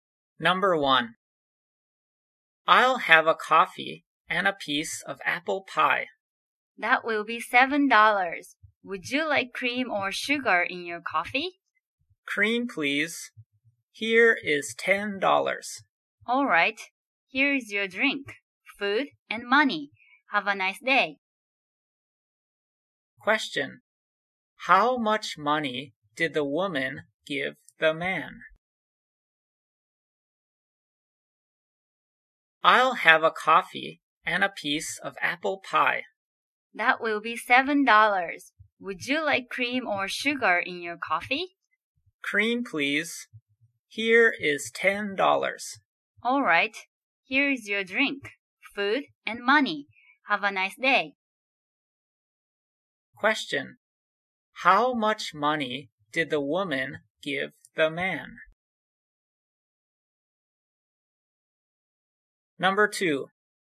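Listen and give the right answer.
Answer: $10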